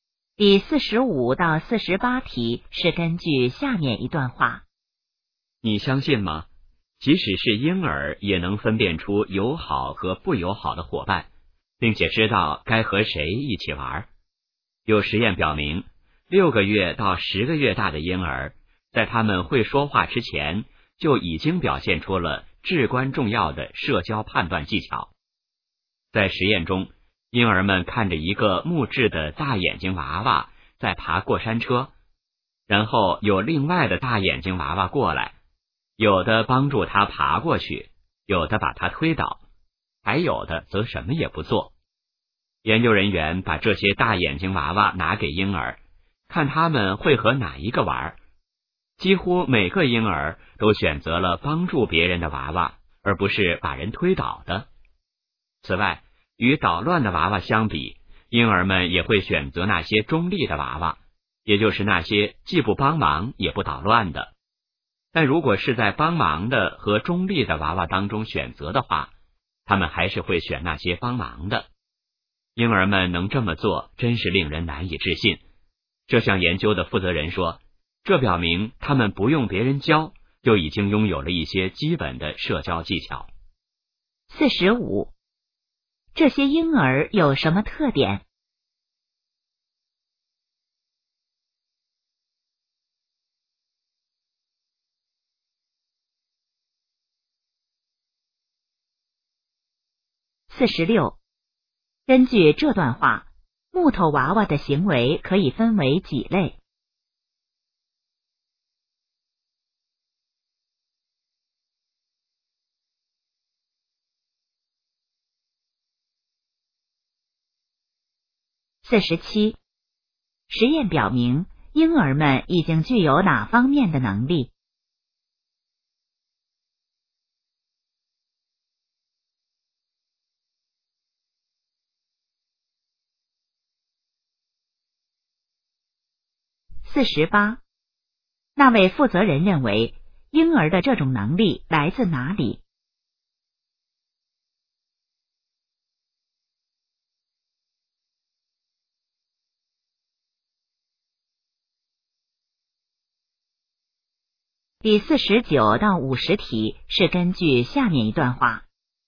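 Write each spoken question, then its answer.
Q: 根据这段话,木头娃娃的行为可以分为几类?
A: 三类

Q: 实验表明,婴儿们已经具有哪方面的能力?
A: 社交判断能力

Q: 那位负责人认为,婴儿的这种能力来自哪里?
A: 天生的,不用别人教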